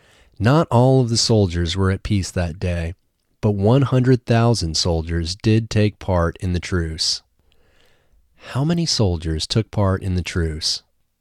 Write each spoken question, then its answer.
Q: How many soldiers took part in the truce?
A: 100,000 soldiers took part in the truce.